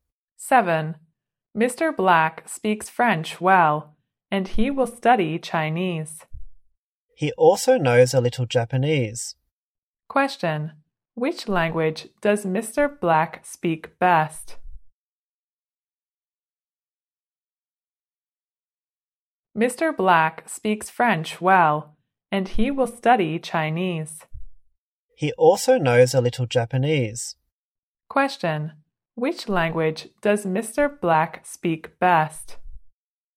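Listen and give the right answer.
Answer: French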